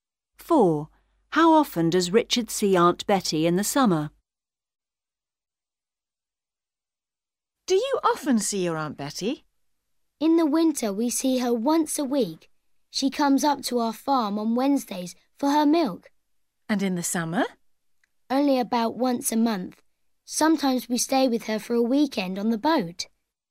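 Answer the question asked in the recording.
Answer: About once a month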